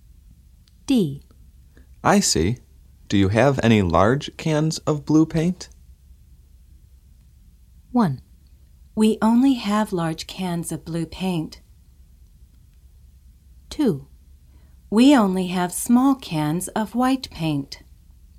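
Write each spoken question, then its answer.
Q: I see. Do you have any large cans of blue paint?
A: 2: We only have small cans of white paint.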